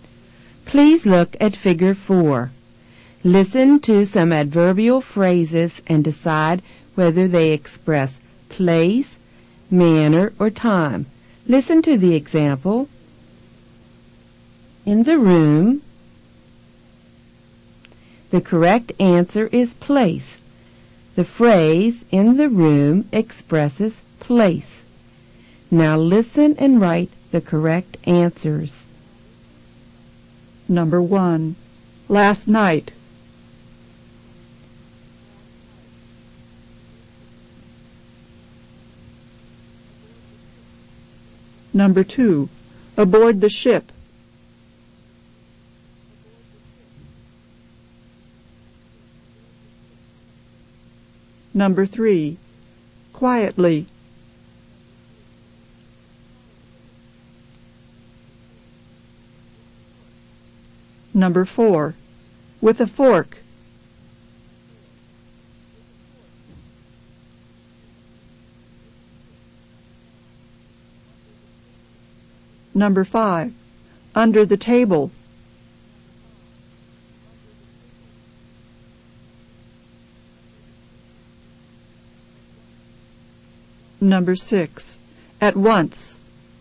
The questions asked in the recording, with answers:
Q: Last night.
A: Last night expresses time.

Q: Aboard the ship.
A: Aboard the ship expresses place.

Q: Quietly.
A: Quietly expresses manner.

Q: With a fork.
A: With a fork expresses manner.

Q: Under the table.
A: Under the table expresses place.

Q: At once.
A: At once expresses time.